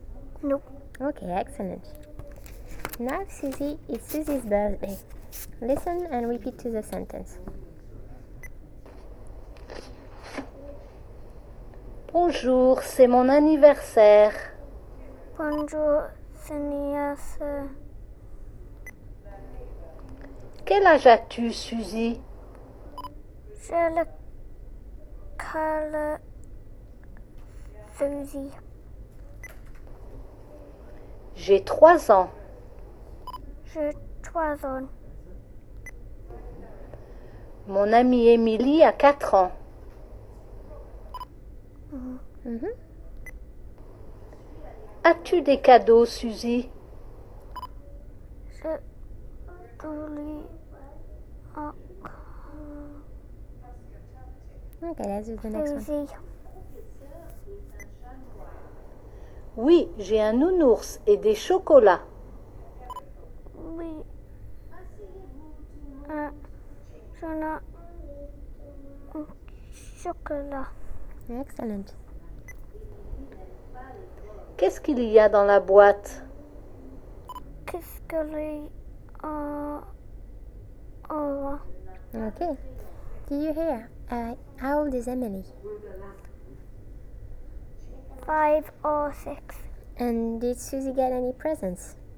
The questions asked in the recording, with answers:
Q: And did Suzy get any presents?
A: Yes, she did?